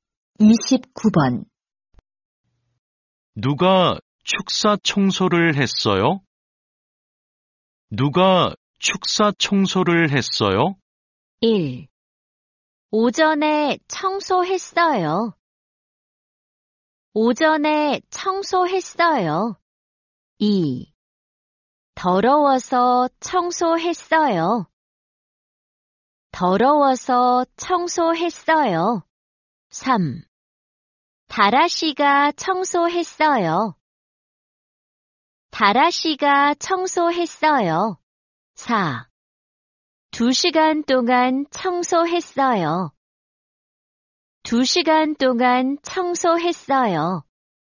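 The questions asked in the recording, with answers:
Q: 누가 축사 청소를 했어요?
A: 3: 다라 씨가 청소했어요.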